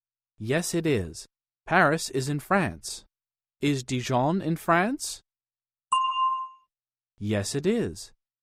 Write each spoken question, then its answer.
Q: Is Dijon in France?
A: Yes, it is.